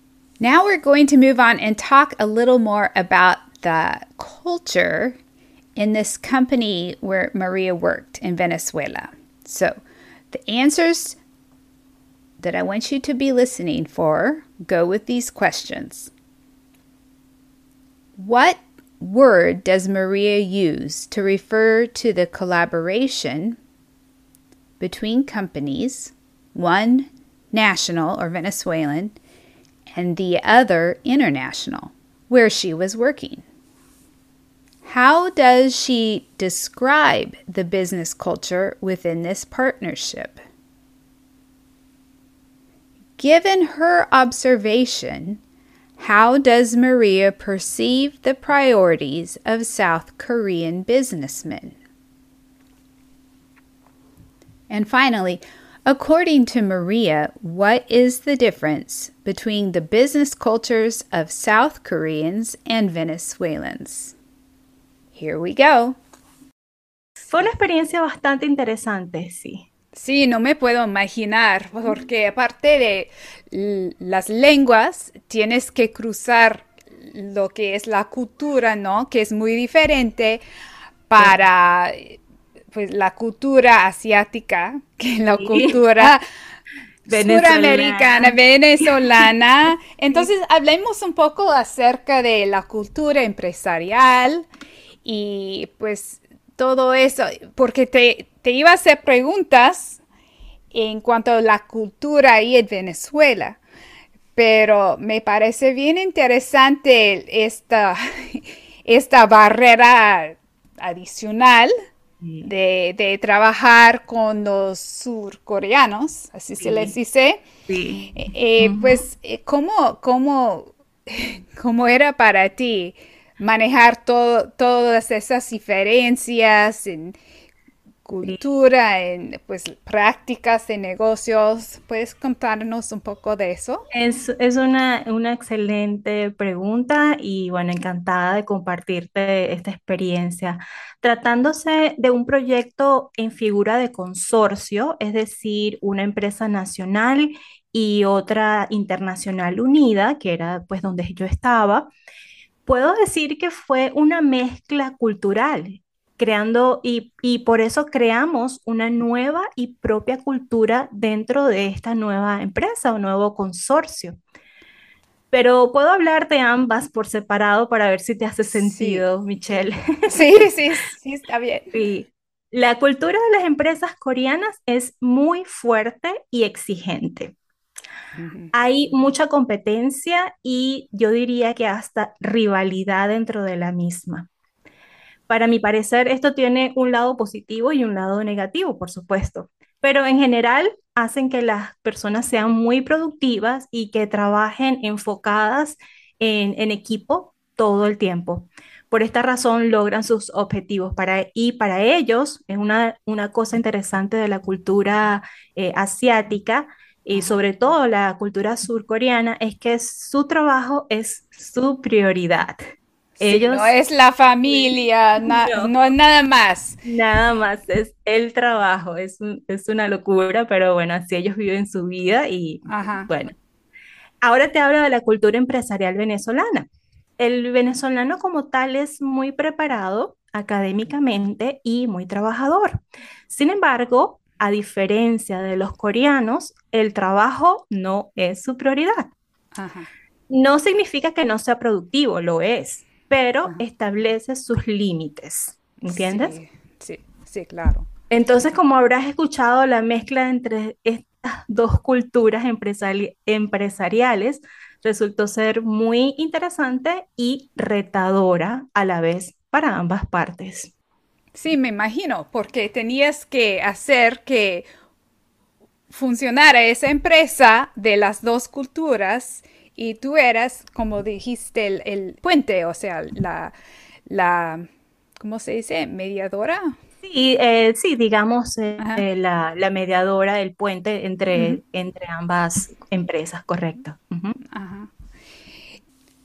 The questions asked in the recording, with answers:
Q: What word does Maria use to refer to the collaboration between companies, one national or Venezuelan, and the other international, where she was working?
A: Y esa palabra es consorcio, un consorcio.

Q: How does she describe the business culture within this partnership?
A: Ella dice que fue una mezcla cultural y que dentro del consorcio se creó una cultura nueva y propia.

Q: Given her observation, how does Maria perceive the priorities of South Korean businessmen?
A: Dice que su trabajo es su prioridad.

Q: And finally, according to Maria, what is the difference between the business cultures of South Koreans and Venezuelans?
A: A diferencia del surcoreano, el venezolano no considera su trabajo como su mayor prioridad.